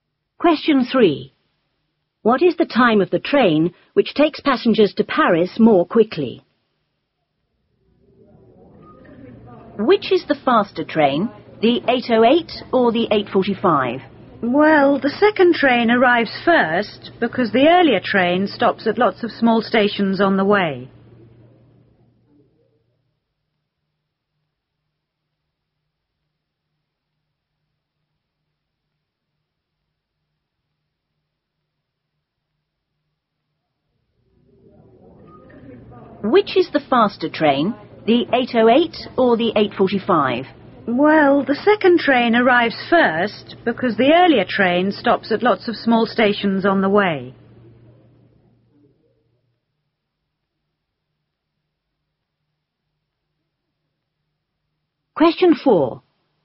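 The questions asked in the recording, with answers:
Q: What is the time of the train which takes passengers to Paris more quickly?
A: 8:45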